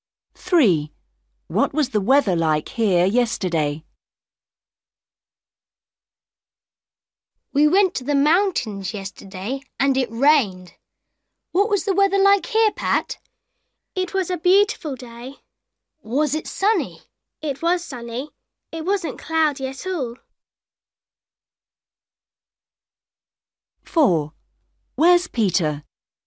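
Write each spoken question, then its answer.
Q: What was the weather like here yesterday?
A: Sunny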